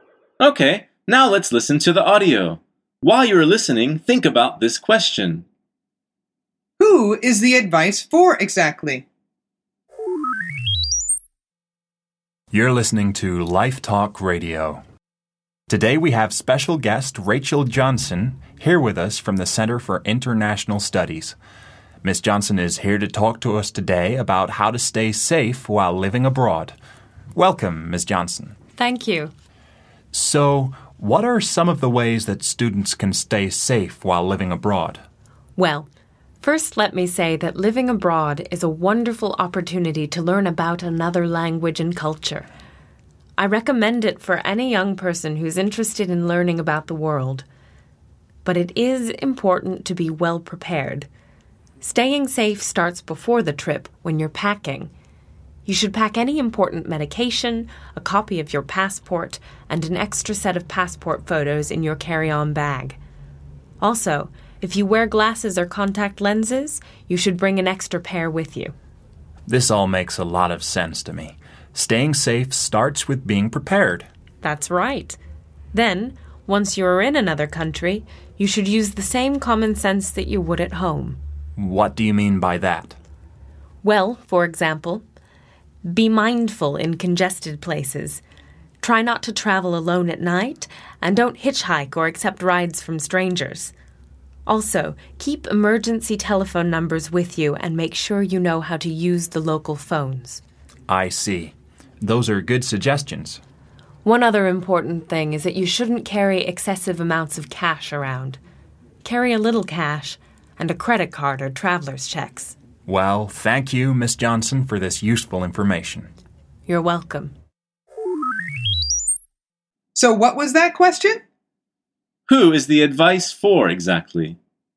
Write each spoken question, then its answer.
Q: Who is the advice for exactly?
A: The answer is students living abroad, away from home.